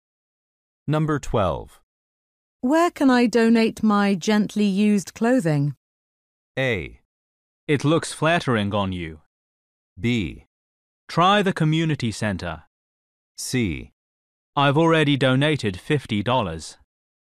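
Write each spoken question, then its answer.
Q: Where can I donate my gently used clothing?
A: B: Try the community center.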